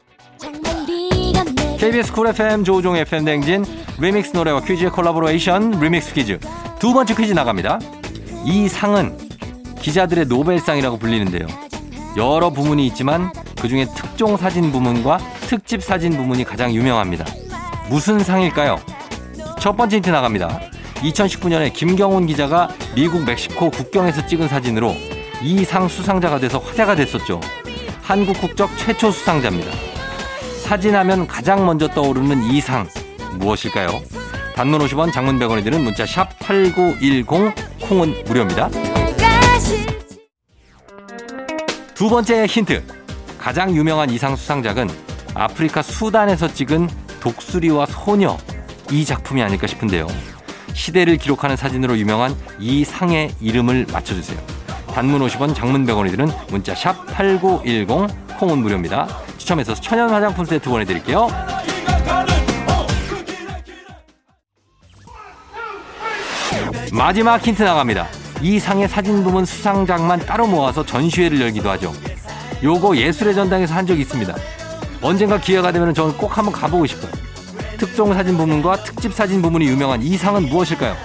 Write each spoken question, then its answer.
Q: 특종 사진 부문과 특집 사진 부문이 유명한 이 상은 무엇일까요?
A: 퓰리처상이죠.